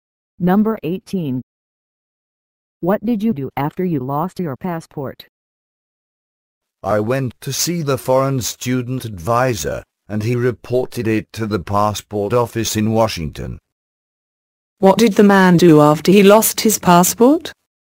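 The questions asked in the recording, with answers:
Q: What did the man do after he lost his passport?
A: He went to see the foreign student advisor.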